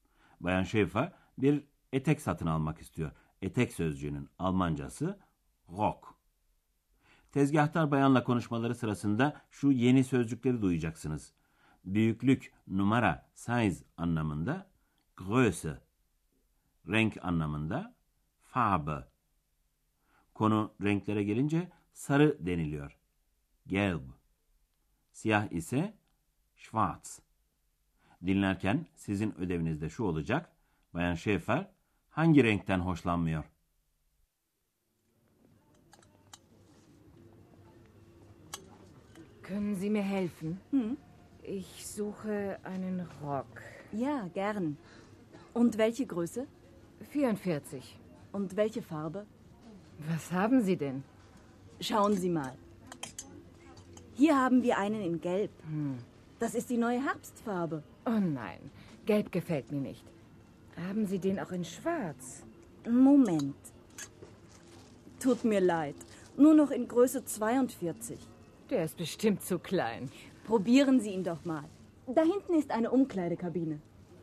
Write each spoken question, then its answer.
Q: Bayan Şefer hangi renkten hoşlanmıyor?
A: Evet sevgili dinleyenler, Bayan Şefer'in hoşlanmadığı renk sarıydı.